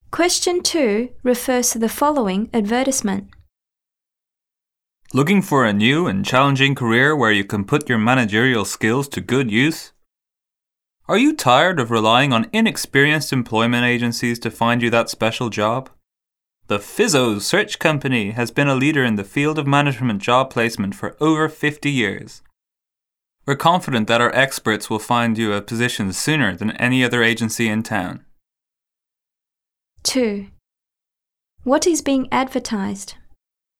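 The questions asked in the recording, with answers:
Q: What is being advertised?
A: A management job placement agency (The Fizzo Search Company)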